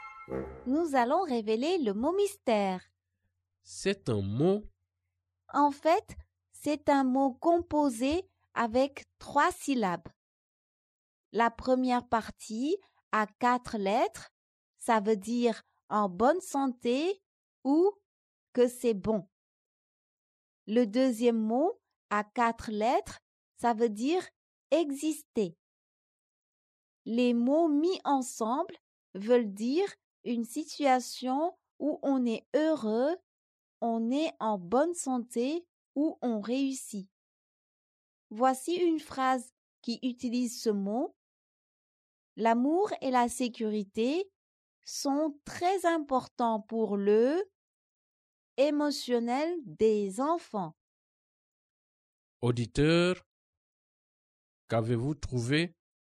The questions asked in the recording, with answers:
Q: Auditeur, qu'avez-vous trouvé?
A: Le mot mystère est bien-être.